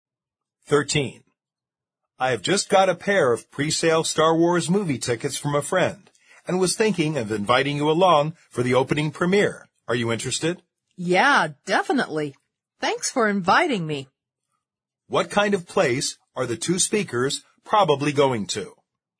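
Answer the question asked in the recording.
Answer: A movie theater (cinema)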